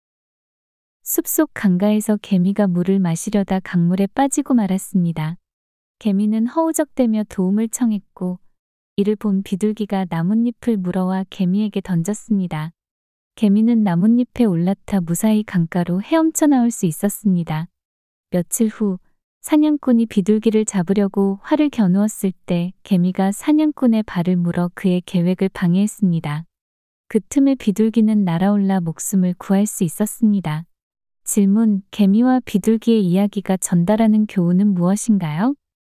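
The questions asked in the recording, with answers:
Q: 개미와 비둘기의 이야기가 전달하는 교훈은 무엇인가요?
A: 남을 도우면 그 도움이 나에게 돌아온다(은혜를 갚는다)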